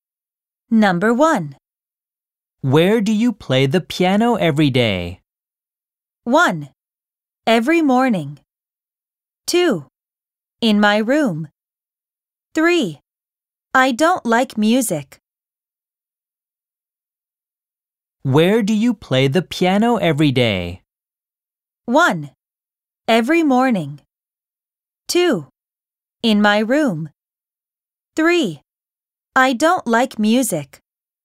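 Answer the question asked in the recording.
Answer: 2: In my room.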